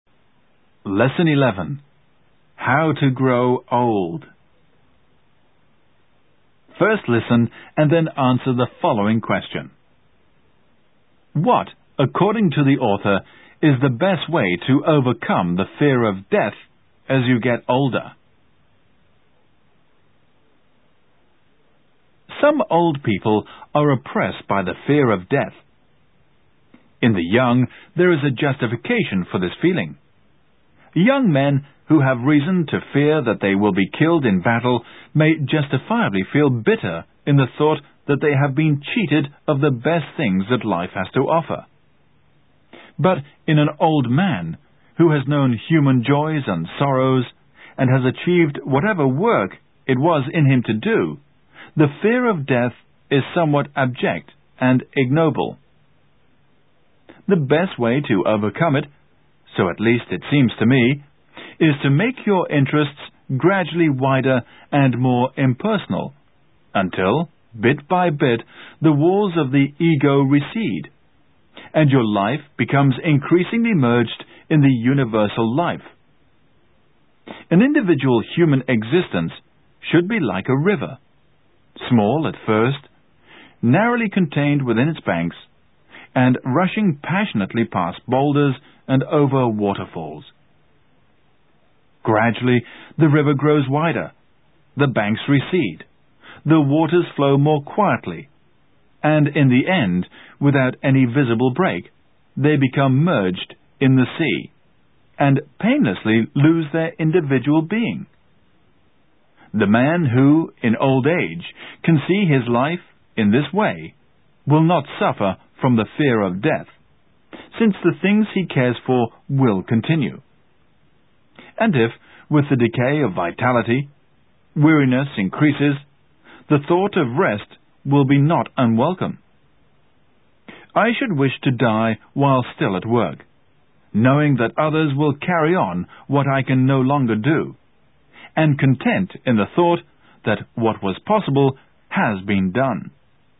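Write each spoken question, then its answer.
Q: What, according to the author, is the best way to overcome the fear of death as you get older?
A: Make your interests gradually wider and more impersonal until your life merges in the universal life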